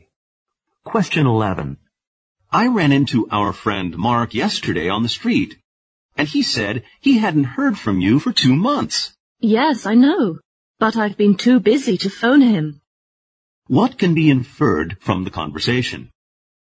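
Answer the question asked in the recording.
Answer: She hasn't contacted Mark for two months because she's been too busy.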